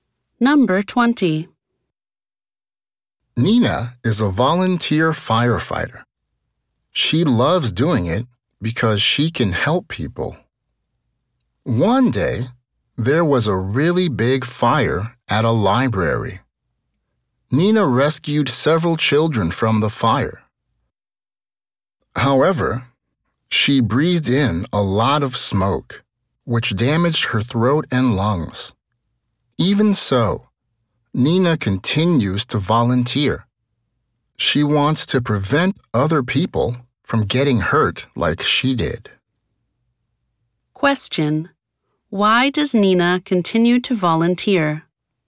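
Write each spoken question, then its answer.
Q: Why does Nina continue to volunteer?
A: She wants to prevent other people from getting hurt like she did.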